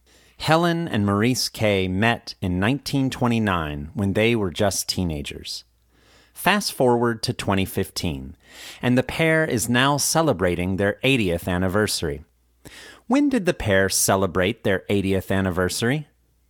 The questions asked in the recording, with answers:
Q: When did the pair celebrate their 80th anniversary?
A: The pair celebrated their 80th anniversary in 2015.